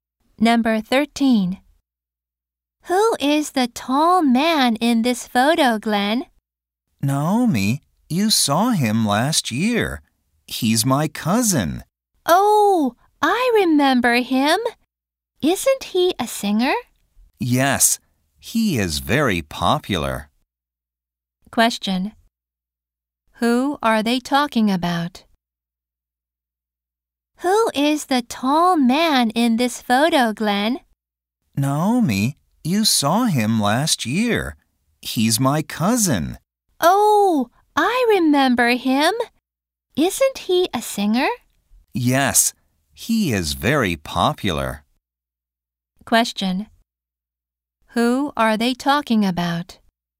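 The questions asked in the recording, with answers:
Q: Question. Who are they talking about?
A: Glenn's cousin.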